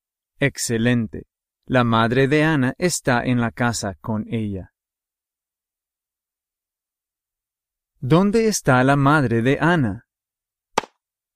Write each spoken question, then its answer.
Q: ¿Dónde está la madre de Anna?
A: En la casa.